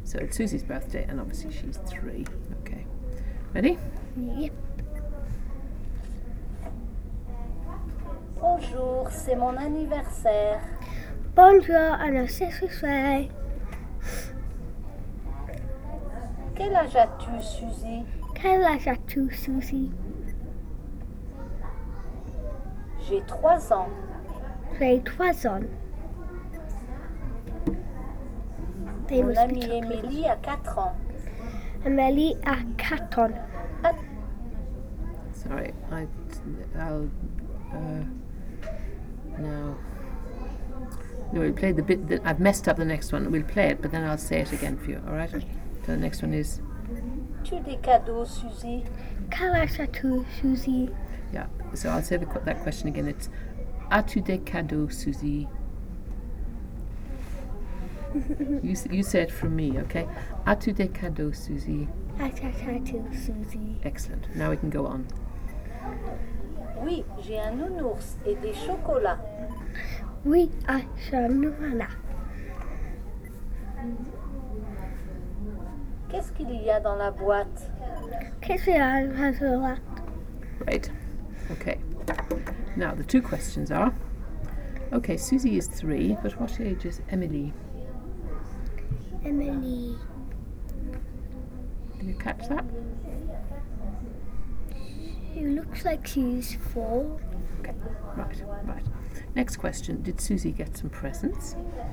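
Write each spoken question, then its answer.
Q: did Susie get some presents?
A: Yes, a teddy bear and chocolates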